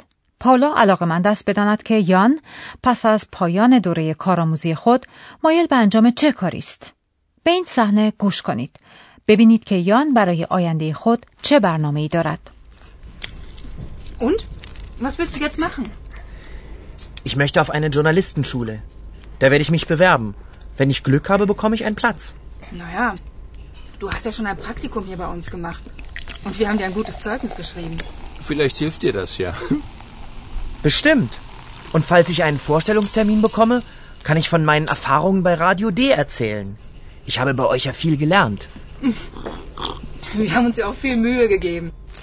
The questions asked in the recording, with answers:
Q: ببینید که یان برای آینده خود چه برنامه ای دارد.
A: یان مایل است در ژورنالیستن شوله یعنی مدرسه خبرنگاری ثبت نام کند.